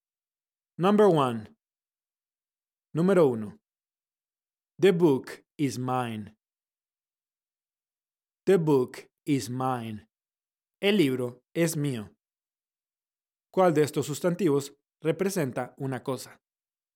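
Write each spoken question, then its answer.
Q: ¿Cuál de estos sustantivos representa una cosa?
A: book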